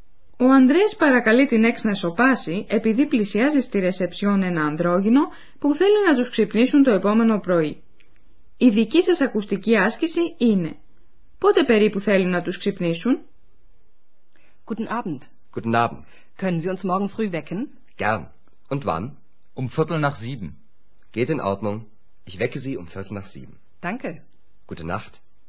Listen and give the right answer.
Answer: Το Ανδρόγινο θέλει να τους ξυπνήσουν περίπου στις 7, συγκεκριμένα λέει ότι θέλει να τους ξυπνήσουν στις 7 και 4.